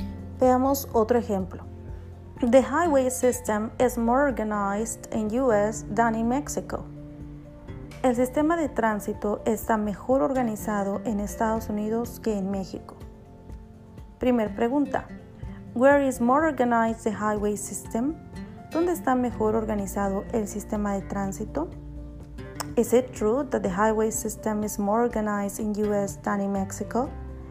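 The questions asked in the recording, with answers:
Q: Where is more organized the highway system?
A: In US

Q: Is it true that the highway system is more organized in US than in Mexico?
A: Yes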